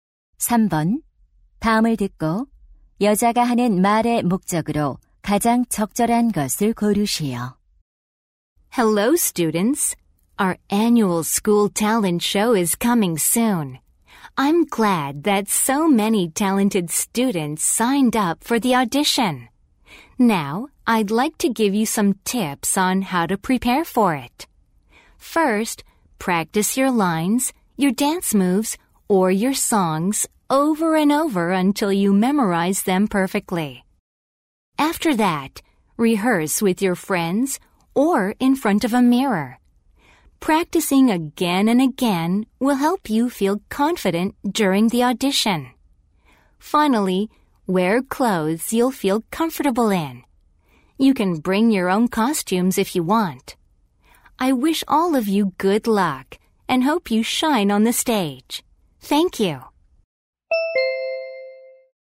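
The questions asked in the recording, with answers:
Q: 다음을 듣고 여자가 하는 말의 목적으로 가장 적절한 것을 고르시오.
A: 학예회 오디션 준비 요령을 알려 주려고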